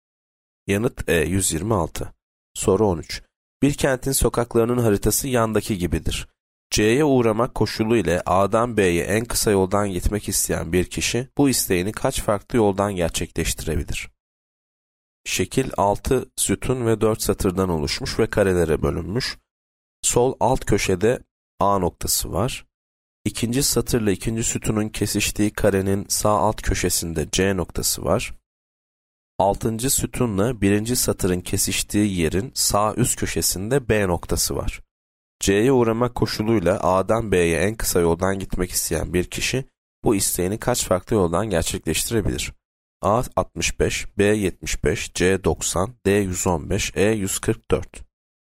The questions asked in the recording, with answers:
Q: C'ye uğramak koşuluyla A'dan B'ye en kısa yoldan gitmek isteyen bir kişi bu isteğini kaç farklı yoldan gerçekleştirebilir?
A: Yanıt C 90.